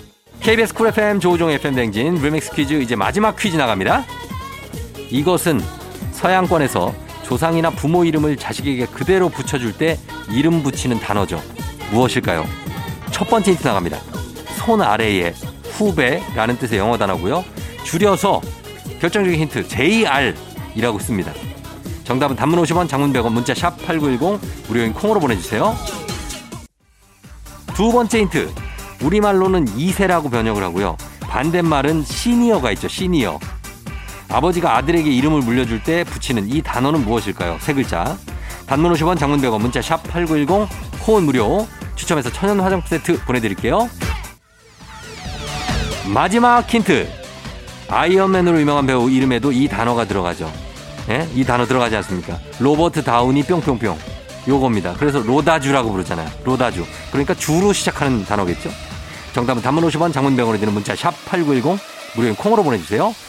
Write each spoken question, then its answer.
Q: 아버지가 아들에게 이름을 물려줄 때 붙이는 이 단어는 무엇일까요?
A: 정답은 바로 두구두구두구두구두구두구두구두구 주니어죠 주니어